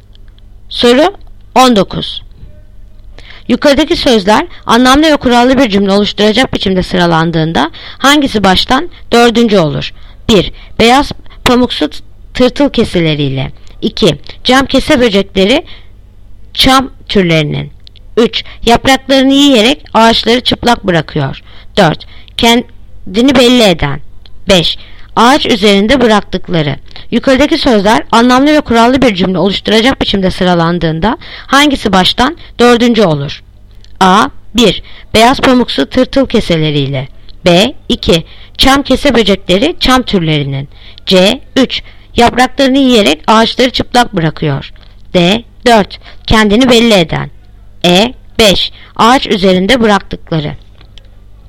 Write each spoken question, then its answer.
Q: Yukarıdaki sözler anlamlı ve kurallı bir cümle oluşturacak biçimde sıralandığında hangisi baştan dördüncü olur?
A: Yanıt Bursa. 2. Çam kese böcekleri çam türlerinin.